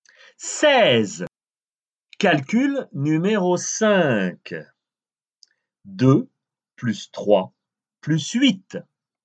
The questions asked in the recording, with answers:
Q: 2 plus 3 plus 8.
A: Treize.